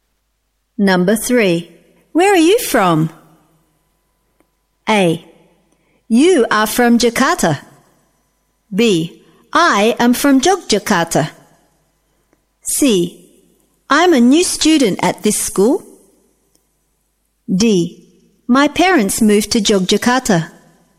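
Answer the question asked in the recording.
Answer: B: I am from Yogyakarta.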